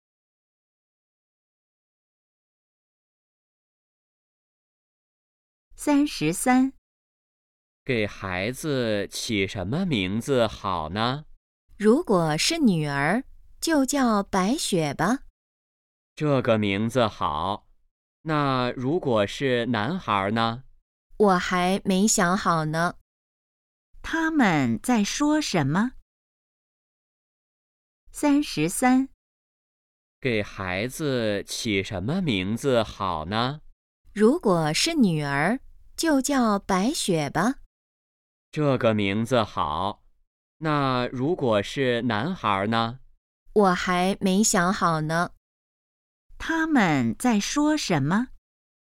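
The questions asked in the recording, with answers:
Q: 他们在说什么?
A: 给孩子起名字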